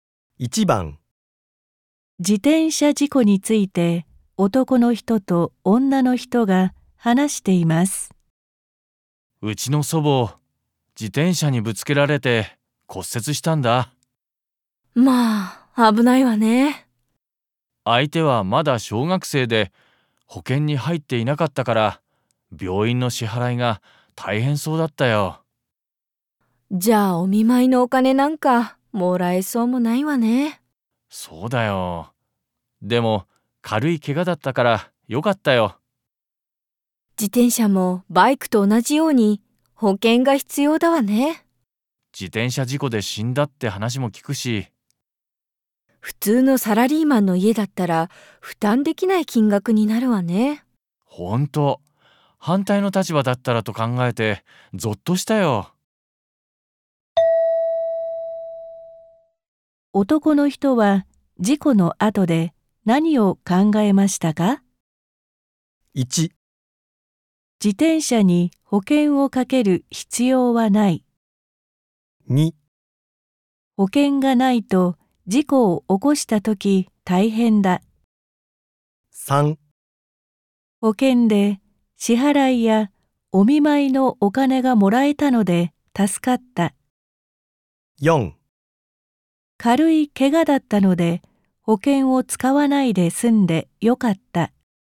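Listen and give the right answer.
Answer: 2: 保険がないと事故を起こしたとき大変だ。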